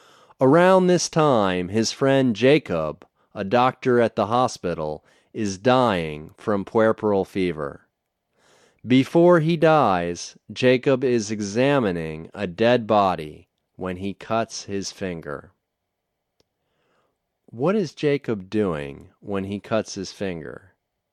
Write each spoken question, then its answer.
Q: What is Jacob doing when he cuts his finger?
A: He is examining a dead body when he cuts his finger.